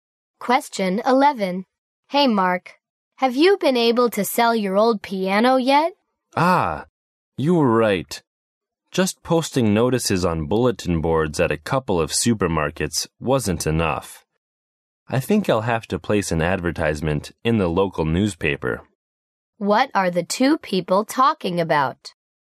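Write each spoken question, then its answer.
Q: What are the 2 people talking about?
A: Selling the man's old piano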